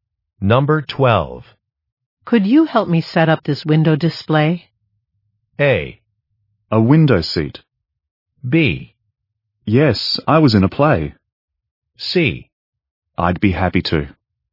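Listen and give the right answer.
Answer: C: I'd be happy to.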